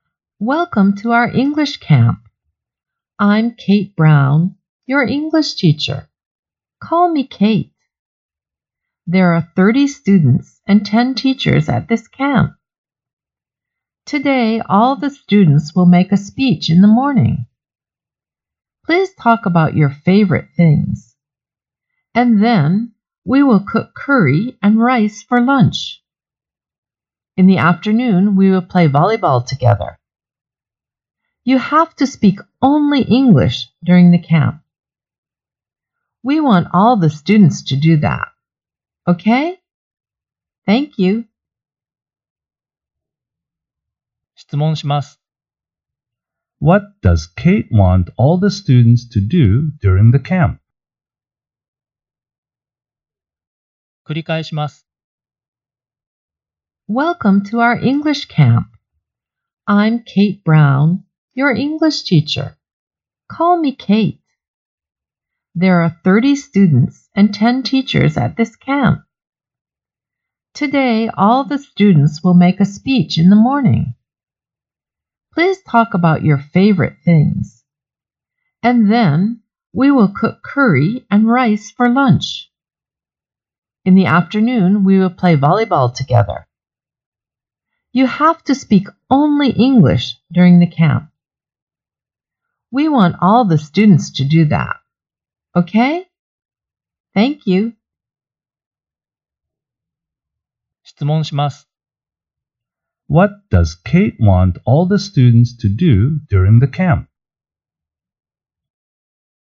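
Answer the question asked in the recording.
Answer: She wants them to speak only English.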